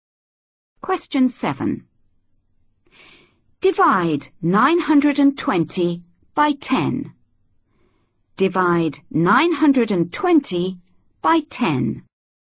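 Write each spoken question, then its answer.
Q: Divide 920 by 10.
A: 92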